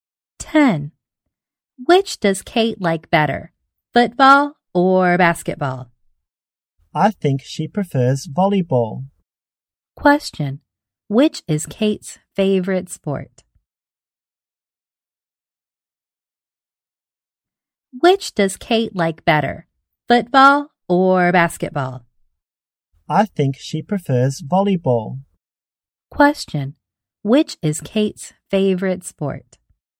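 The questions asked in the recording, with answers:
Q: which is Kate's favorite sport?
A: Volleyball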